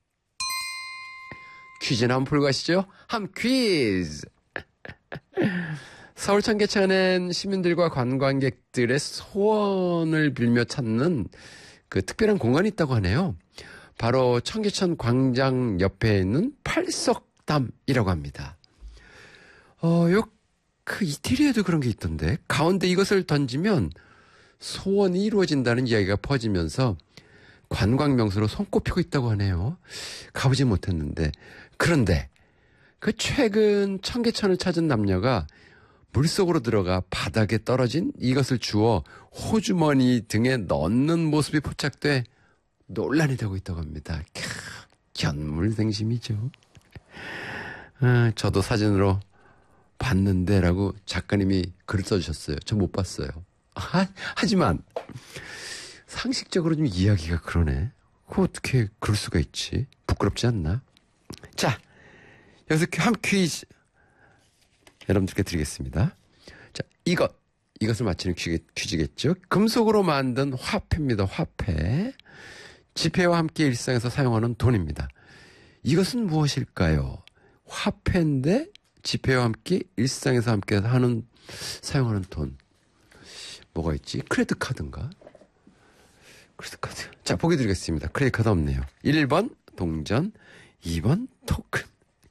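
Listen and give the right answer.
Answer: 1번: 동전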